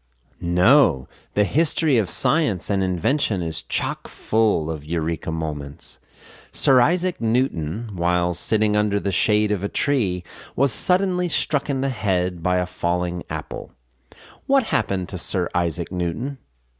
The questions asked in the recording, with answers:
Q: What happened to Sir Isaac Newton?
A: While sitting under the shade of a tree, he was suddenly struck in the head by a falling apple.